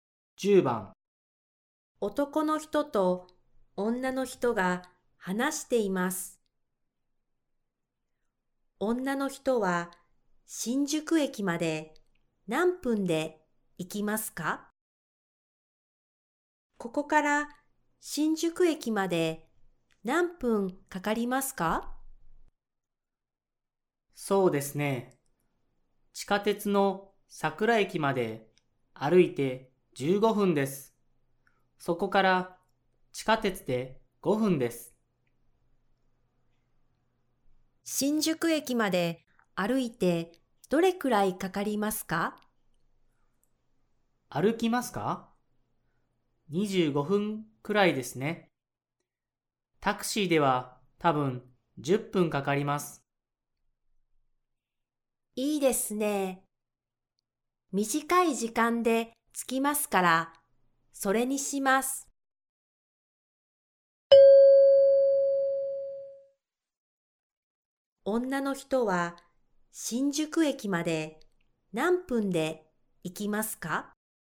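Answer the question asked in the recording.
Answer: 10分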